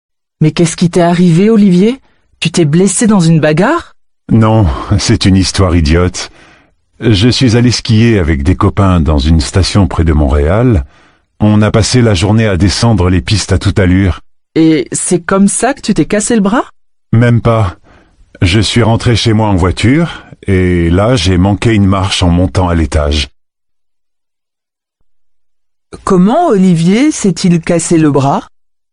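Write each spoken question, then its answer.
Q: Comment Olivier s'est-il cassé le bras?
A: Il a manqué une marche en montant l'escalier chez lui.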